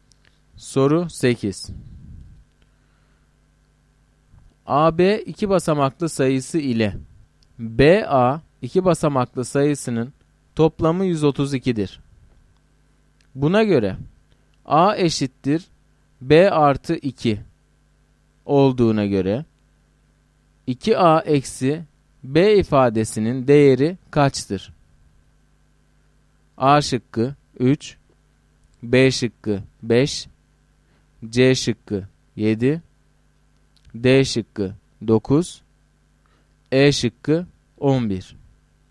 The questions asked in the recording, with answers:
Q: Buna göre A eşittir B artı 2 olduğuna göre 2A eksi B ifadesinin değeri kaçtır?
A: Doğru cevap D şıkkı.